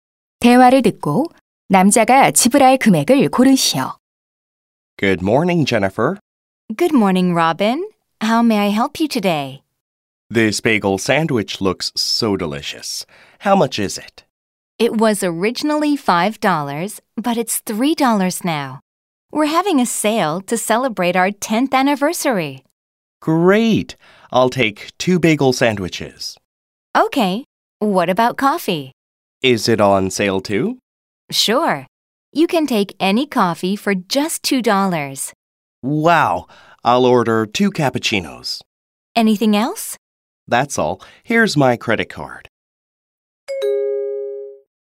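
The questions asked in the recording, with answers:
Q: 대화를 듣고 남자가 지불할 금액을 고르시오.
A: 10달러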